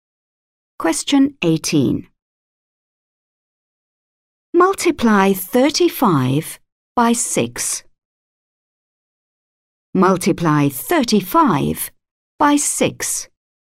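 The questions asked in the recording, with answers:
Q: Multiply 35 by 6.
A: 210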